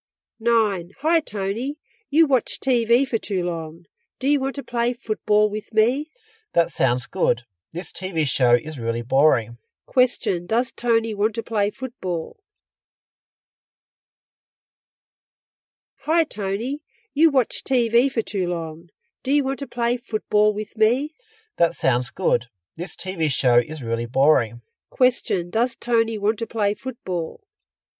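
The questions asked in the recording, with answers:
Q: Question, does Tony want to play football?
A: Yes, he does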